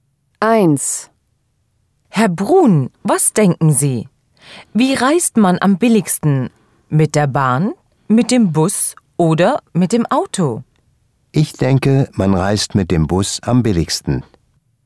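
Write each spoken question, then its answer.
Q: Wie reist man am billigsten?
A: Mit dem Bus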